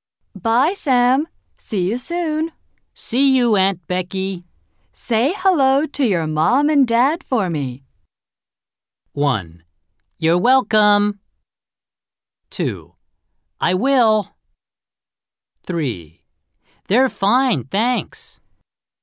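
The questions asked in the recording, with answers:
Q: Say hello to your mom and dad for me.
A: 2: I will.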